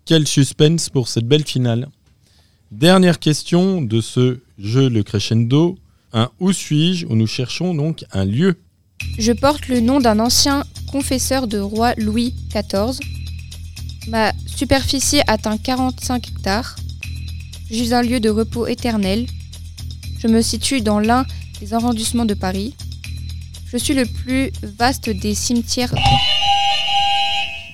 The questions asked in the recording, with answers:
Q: Un « Où suis-je ?» où nous cherchons donc un lieu.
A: Le cimetière du Père Lachaise, c'est une bonne réponse.